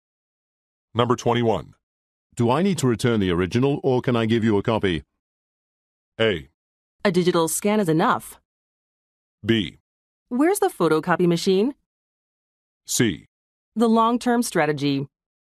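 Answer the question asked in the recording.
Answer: A: A digital scan is enough.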